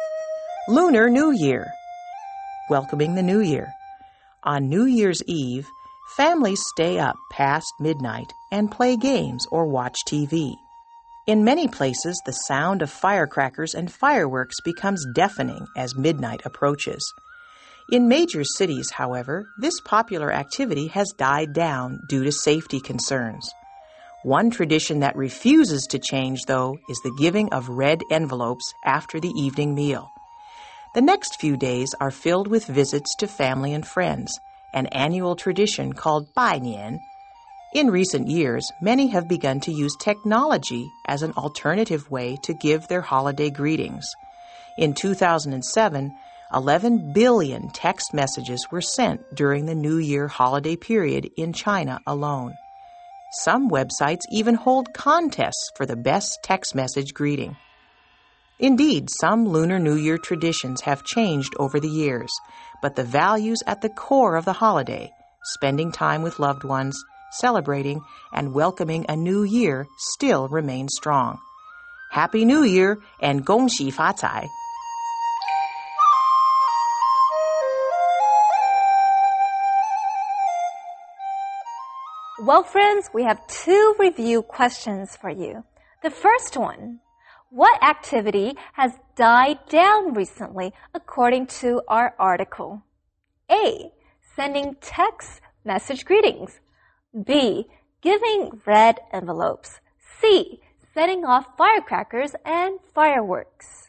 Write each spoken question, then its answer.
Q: What activity has died down recently, according to our article?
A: it's letter C, setting off firecrackers and fireworks.